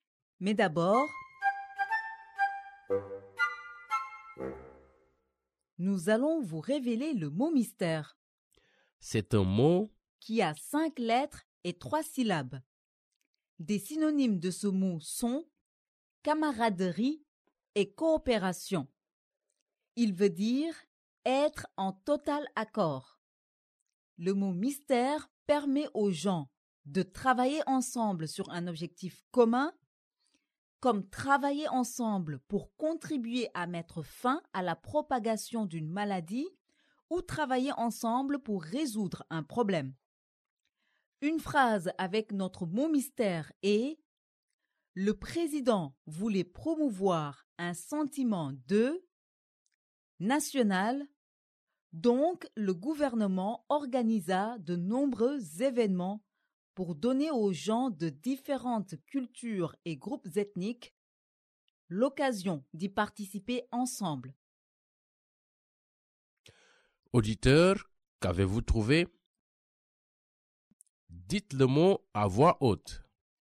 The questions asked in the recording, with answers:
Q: Auditeurs, qu'avez-vous trouvé?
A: Le mot mystère d'aujourd'hui est unité.